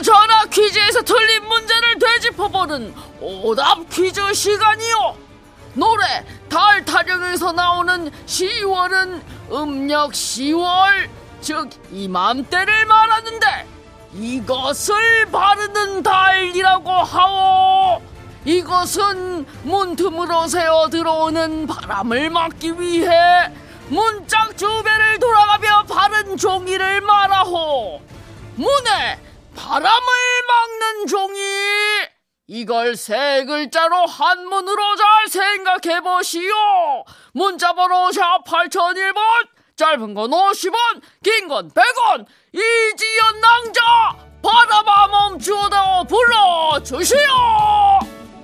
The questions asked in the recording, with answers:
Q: 이걸 세 글자로 한문으로 잘 생각해 보시오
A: 문풍지입니다.